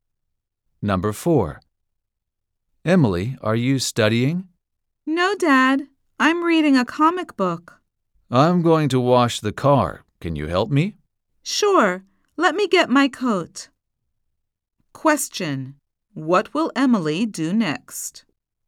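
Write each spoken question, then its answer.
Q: What will Emily do next?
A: Help her dad wash the car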